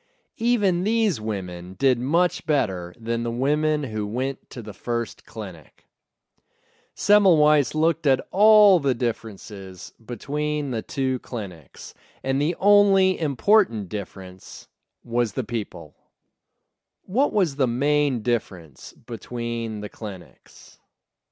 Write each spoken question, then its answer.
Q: What was the main difference between the clinics?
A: The main difference between the clinics was the people.